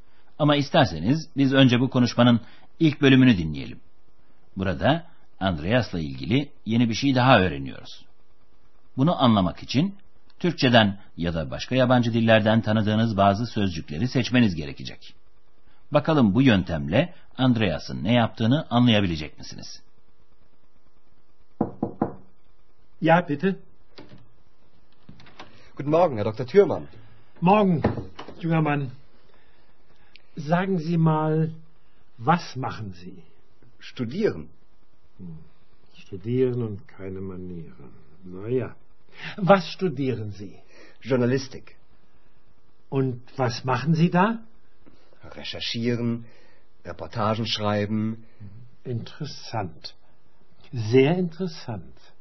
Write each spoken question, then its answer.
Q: Bakalım bu yöntemle Andreas'ın ne yaptığını anlayabilecek misiniz?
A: Andreas gazetecilik okuyor.